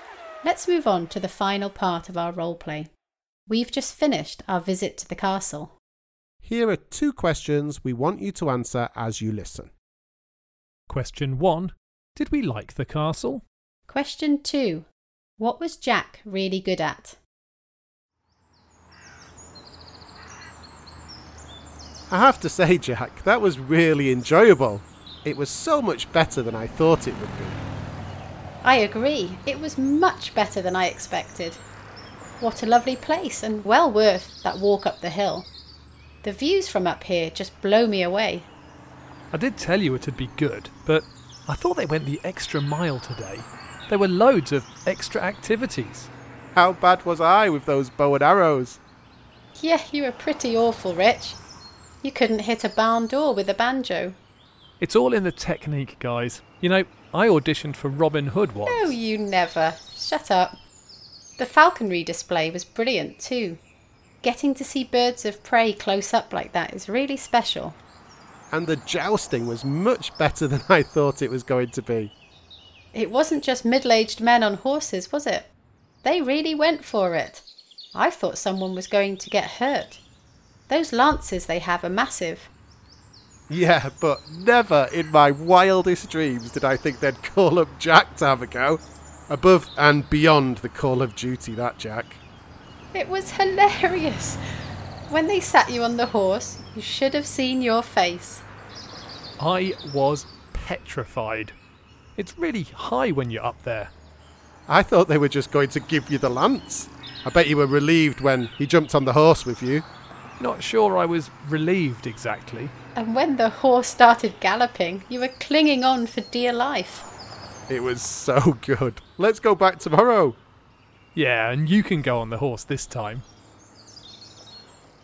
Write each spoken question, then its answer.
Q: Did we like the castle?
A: The answer is yes, all of us did.